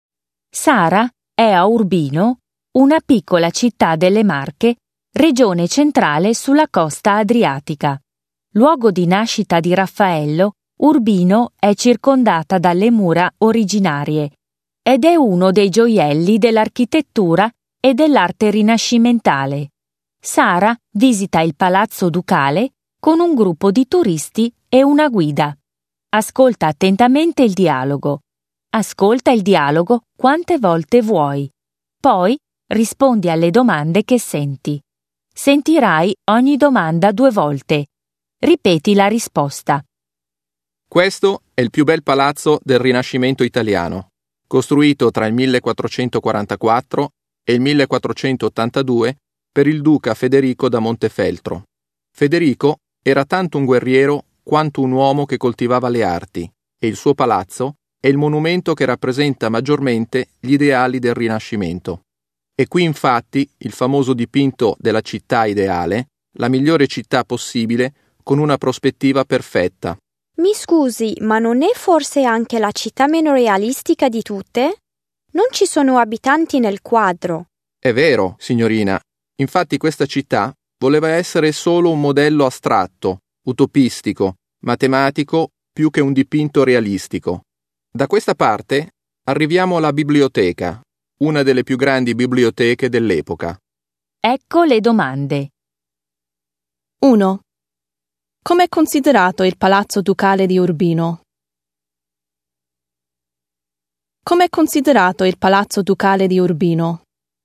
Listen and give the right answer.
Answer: È considerato il palazzo che rappresenta meglio il Rinascimento italiano.